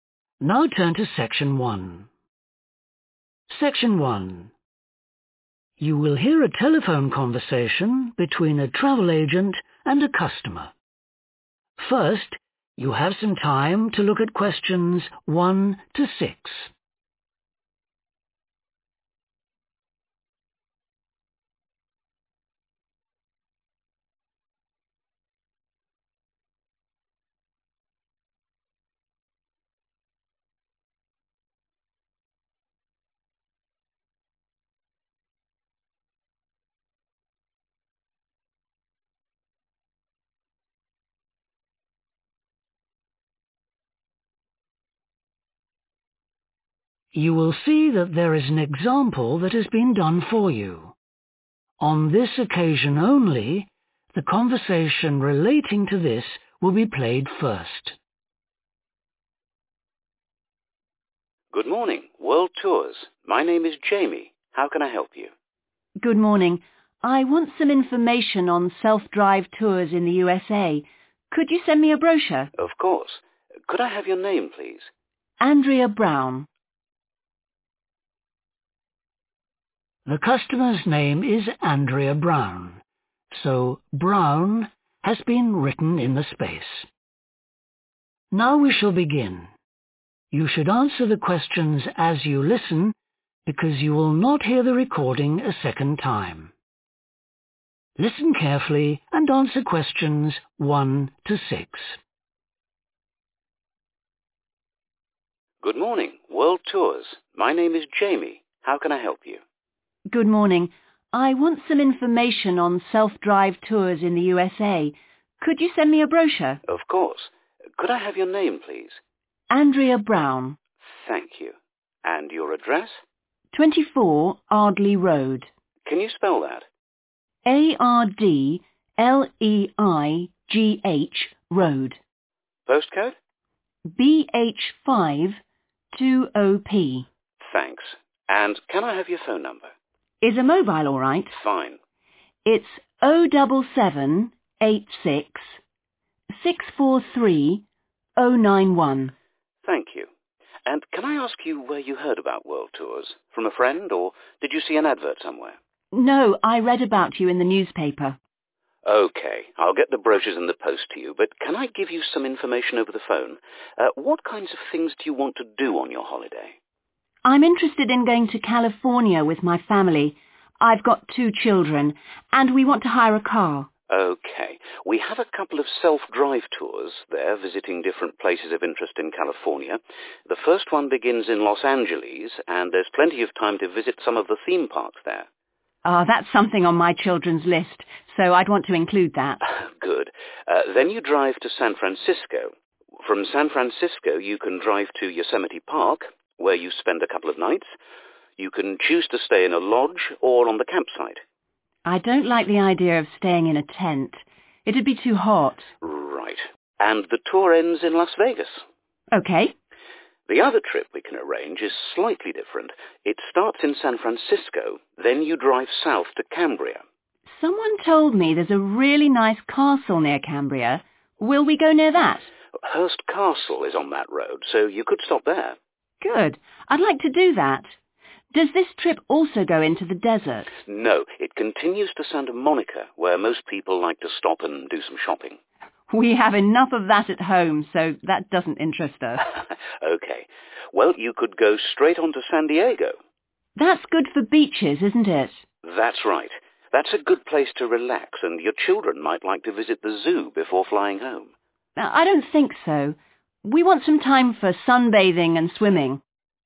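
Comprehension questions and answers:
Complete the notes below. Write ONE WORD for each answer.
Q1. Address: 24 1 ..................... Road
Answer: Ardleigh

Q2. Heard about company from: 2 ........................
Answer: newspaper

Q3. Los Angeles: customer wants to visit some 3 ................. parks with her children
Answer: theme

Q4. Yosemite Park: customer wants to stay in a lodge, not a 4 .....................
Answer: tent

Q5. Customer wants to see the 5 ............. on the way to Cambria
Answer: castle

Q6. At San Diego, wants to spend time on the 6 ......................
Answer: beach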